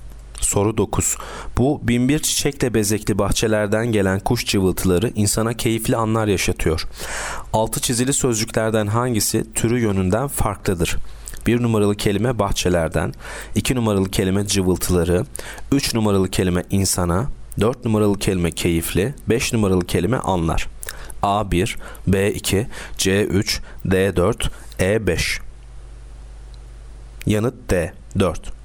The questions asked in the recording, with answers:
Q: Altı çizili sözcüklerden hangisi türü yönünden farklıdır?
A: Yanıt D4.